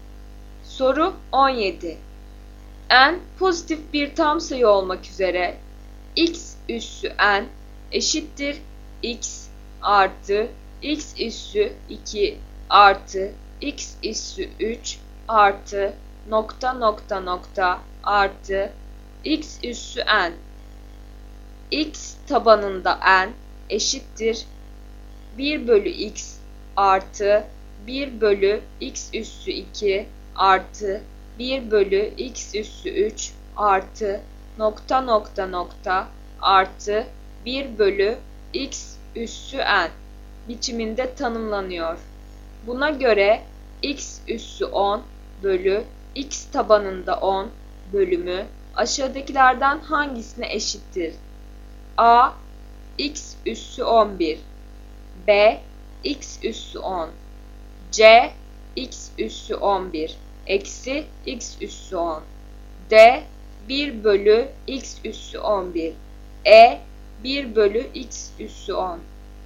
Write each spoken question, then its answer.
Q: Buna göre x üssü 10 bölü x tabanında 10 bölümü aşağıdakilerden hangisine eşittir?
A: Doğru yanıt A x üssü 11.